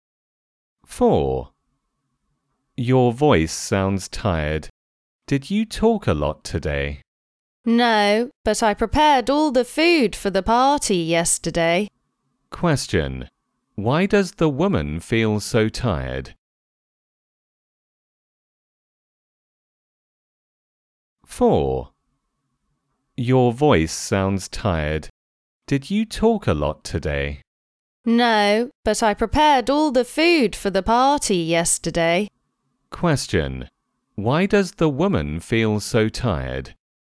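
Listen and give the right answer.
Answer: She prepared all the food for the party yesterday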